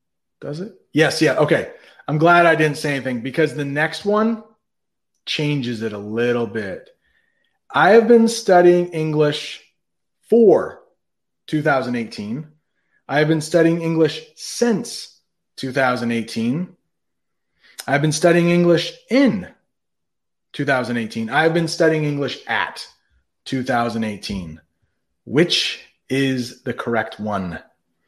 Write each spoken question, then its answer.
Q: Which is the correct one?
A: Since I've been studying English since 2018.